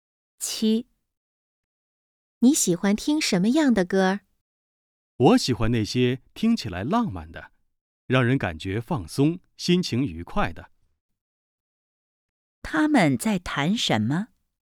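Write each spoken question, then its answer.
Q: 他们在谈什么?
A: 喜欢听的歌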